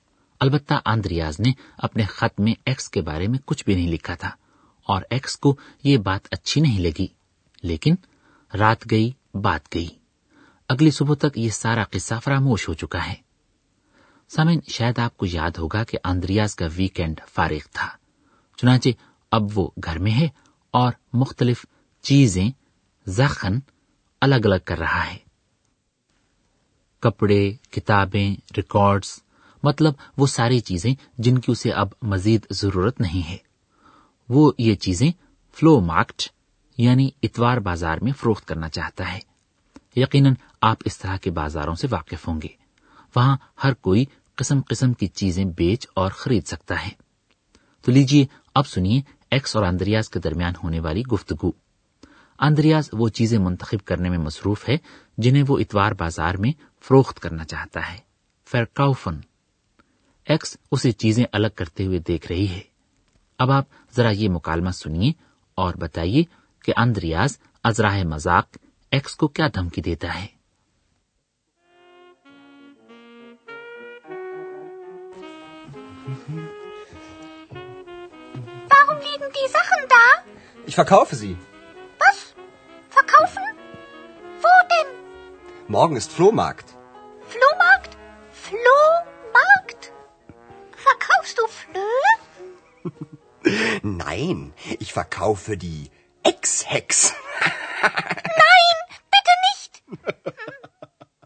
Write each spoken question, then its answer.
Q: اب آپ ذرا یہ مکالمہ سنیے اور بتائیے کہ اندریاز ازراہ مذاق x کو کیا دھمکی دیتا ہے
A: x <laughs> کو دھمکی دیتا ہے کہ وہ اپنی چیزوں کی طرح اسے بھی فروخت کر دے گا